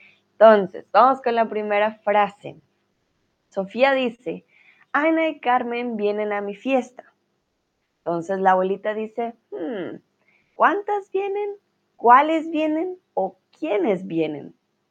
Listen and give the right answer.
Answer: la abuelita va a preguntar, ¿quiénes vienen?